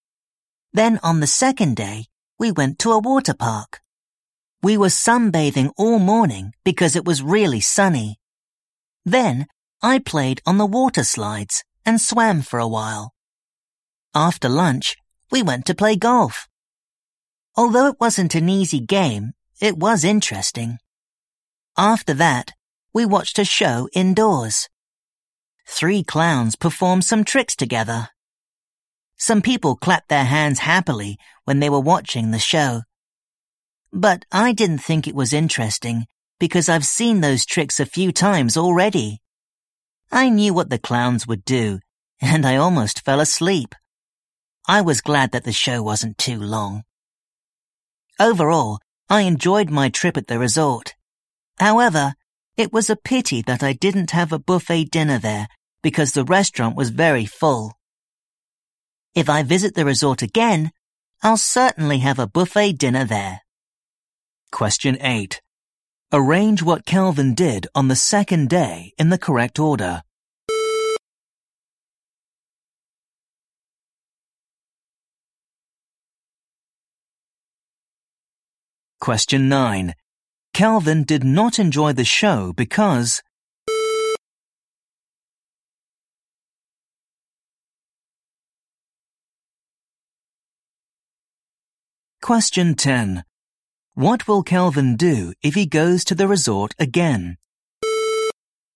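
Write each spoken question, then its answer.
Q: Arrange what Kelvin did on the second day in the correct order.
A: Sunbathed, played on water slides and swam, played golf, watched a show

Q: Kelvin did not enjoy the show because...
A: He had seen those tricks a few times already

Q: What will Kelvin do if he goes to the resort again?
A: Have a buffet dinner there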